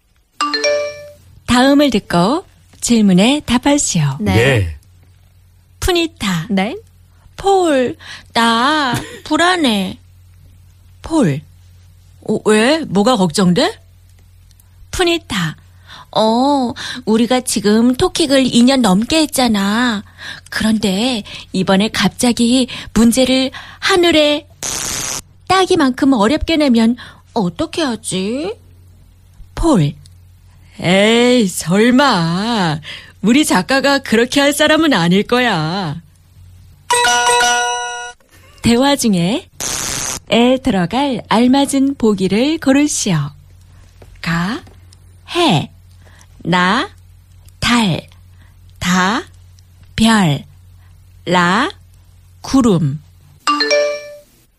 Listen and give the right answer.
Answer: 다, 별, star.